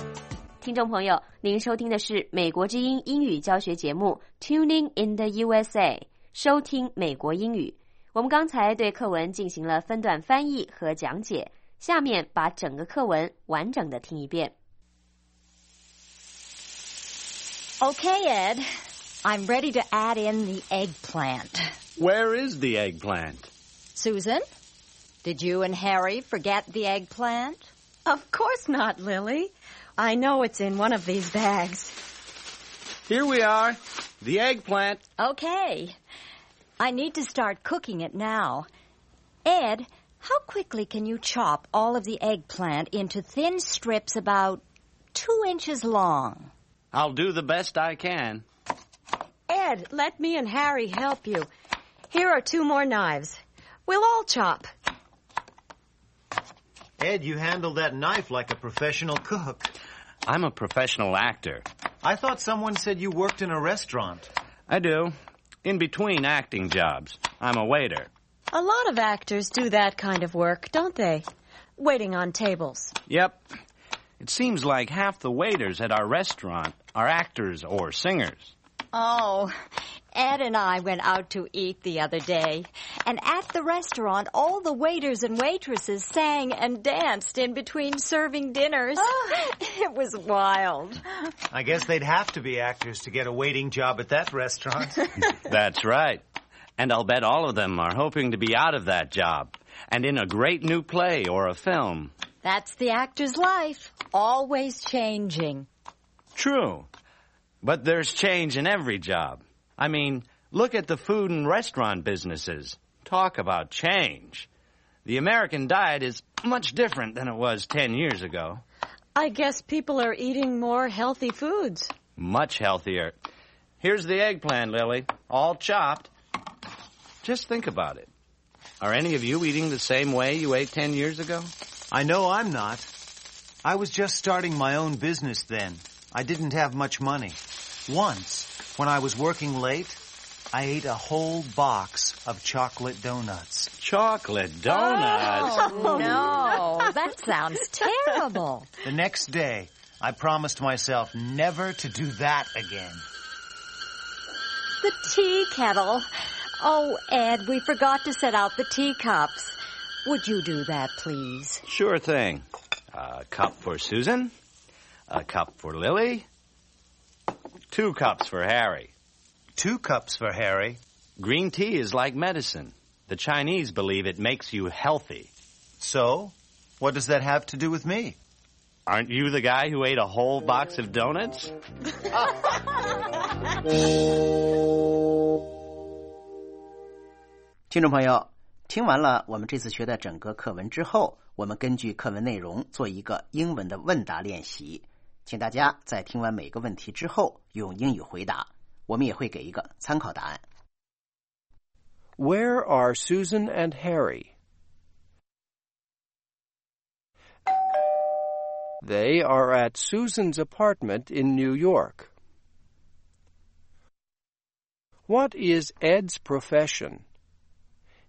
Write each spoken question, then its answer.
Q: What is Ed's profession?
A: He is an actor and also a waiter in a restaurant.